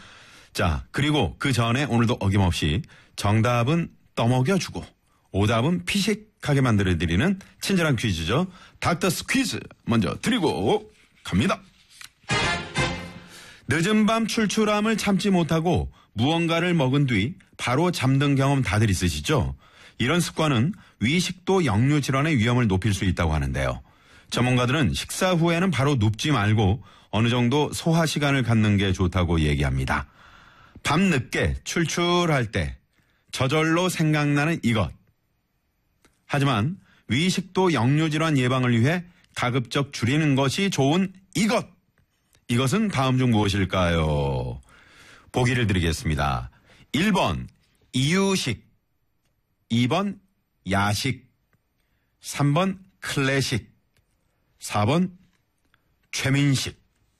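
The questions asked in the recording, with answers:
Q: 이것은 다음 중 무엇일까요?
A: 2: 야식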